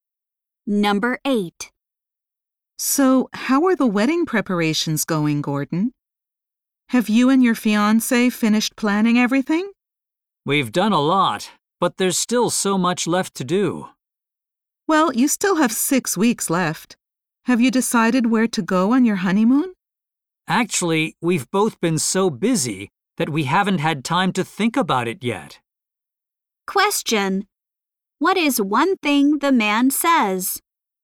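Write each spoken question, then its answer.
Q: What is one thing the man says?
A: They haven't decided on their honeymoon yet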